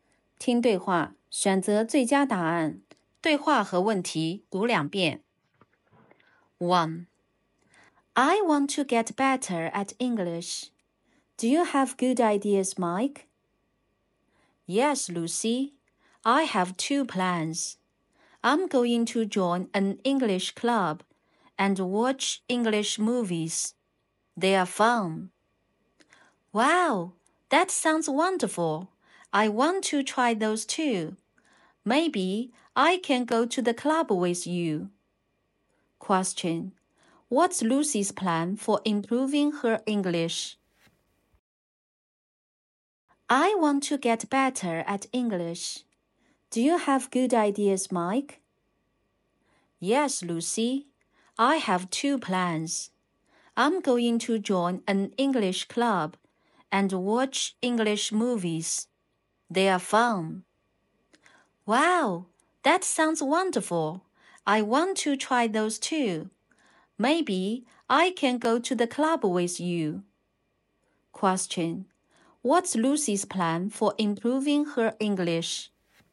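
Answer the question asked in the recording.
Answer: Join an English club and watch English movies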